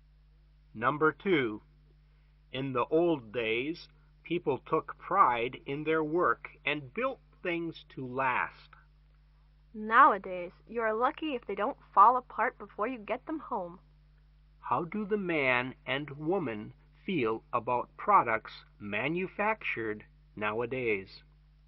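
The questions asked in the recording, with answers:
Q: How do the man and woman feel about products manufactured nowadays?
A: They think products are poorly made and don't last.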